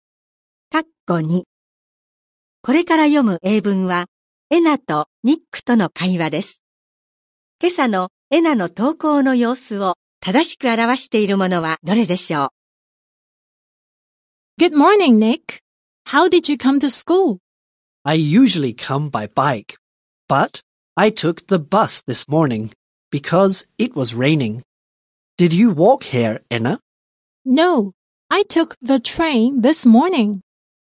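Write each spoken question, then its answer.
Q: 今朝のエナの投稿の様子を正しく表しているものはどれでしょう。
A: 電車で登校した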